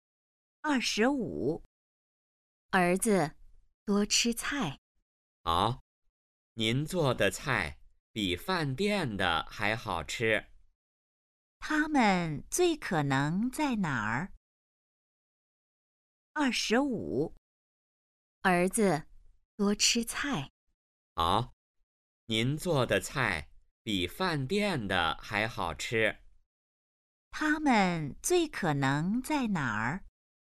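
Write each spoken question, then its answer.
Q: 他们最可能在哪儿?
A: 在家里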